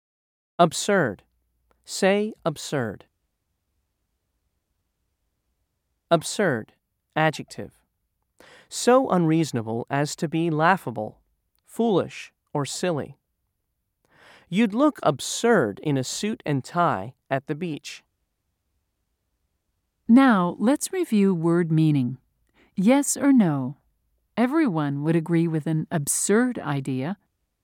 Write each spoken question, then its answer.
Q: Yes or no? Everyone would agree with an absurd idea.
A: If you said no, you were correct.